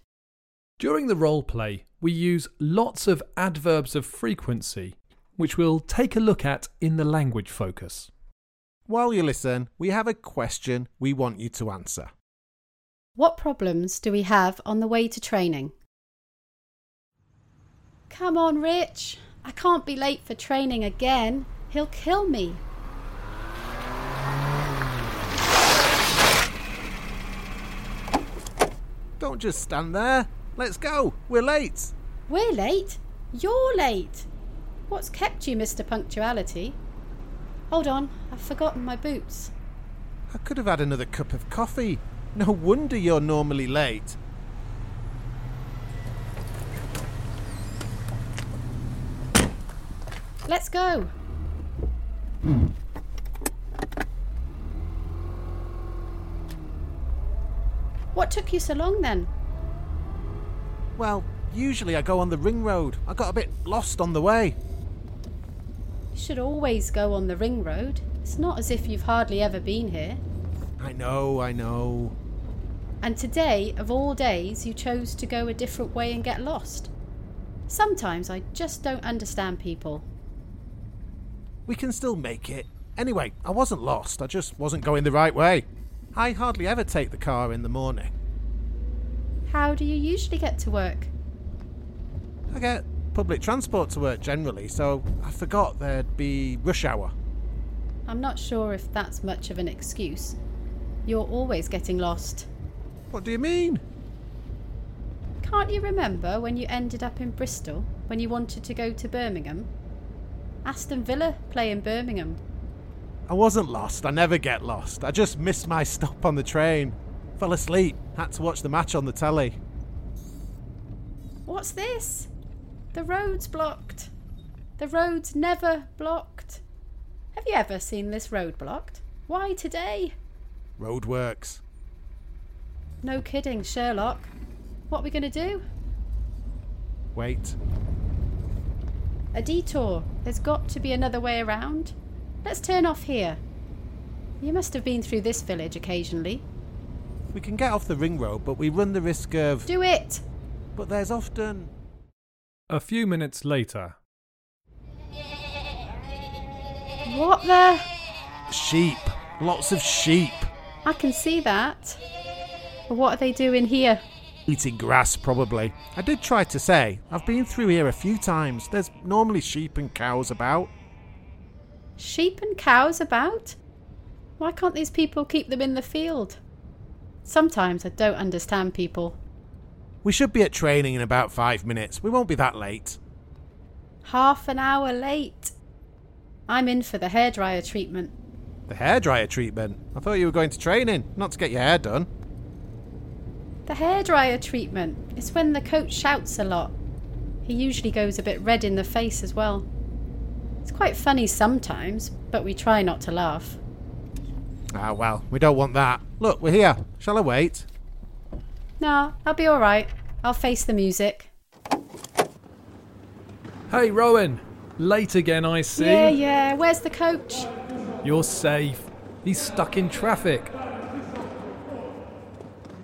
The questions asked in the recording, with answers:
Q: What problems do we have on the way to training?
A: Well, the first problem was that Rich was late. Then the road was blocked because of some roadworks. And then when we took a detour, we got blocked by a flock of sheep.